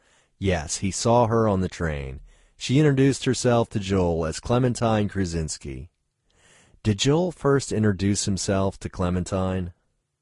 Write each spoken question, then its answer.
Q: Did Joel first introduce himself to Clementine?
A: No, Clementine first introduced herself to Joel.